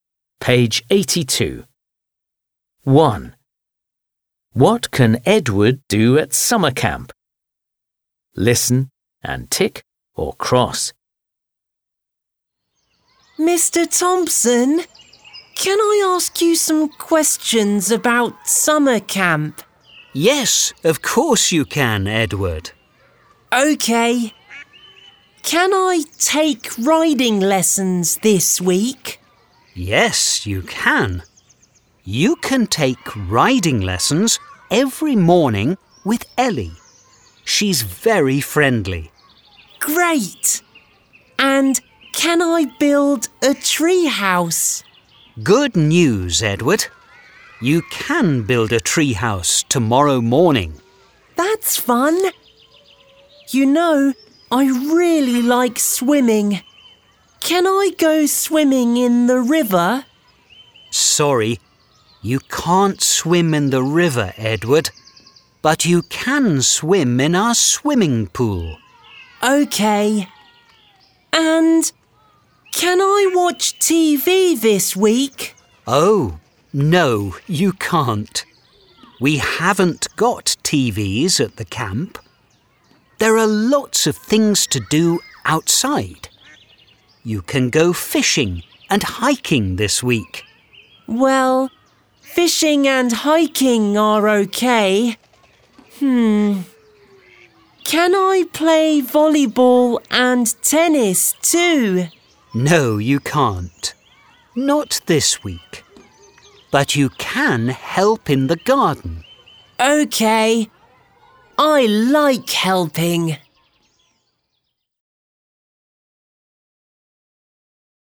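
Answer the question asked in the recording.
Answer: Take riding lessons, build a treehouse, swim in the swimming pool, go fishing and hiking, and help in the garden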